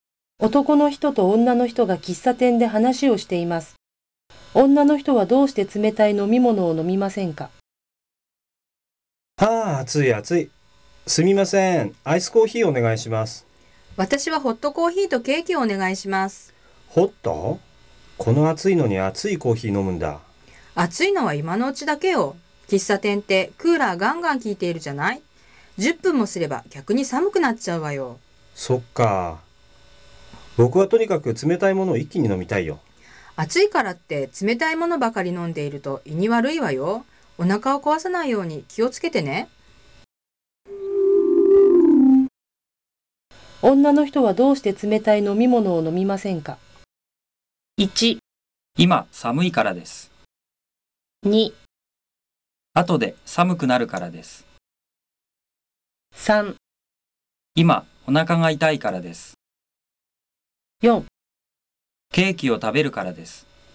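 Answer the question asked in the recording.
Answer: 2: 後で寒くなるからです。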